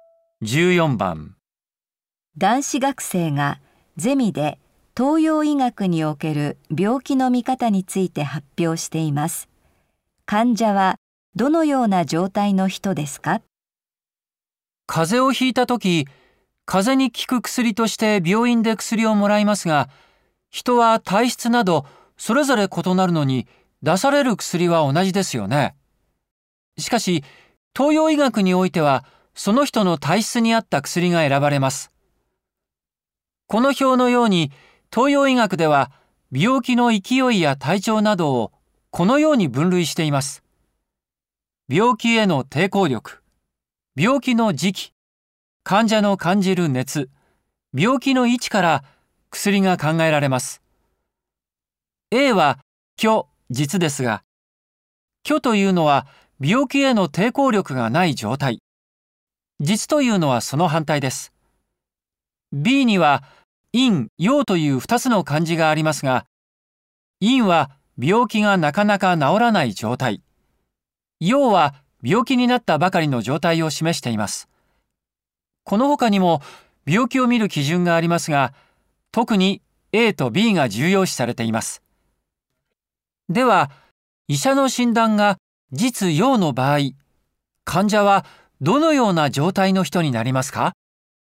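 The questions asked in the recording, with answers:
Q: では医者の診断が実陽の場合、患者はどのような状態の人になりますか?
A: 病気への抵抗力があり、病気になったばかりの人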